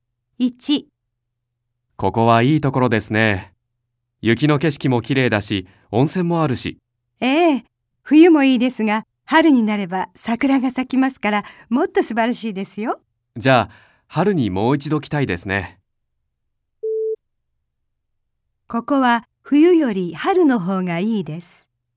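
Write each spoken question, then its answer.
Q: ここは冬より春の方がいいです。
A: ○(正しい)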